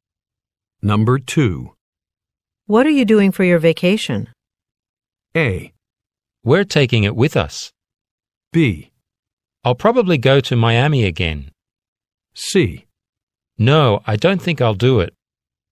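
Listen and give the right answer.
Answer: B: I'll probably go to Miami again.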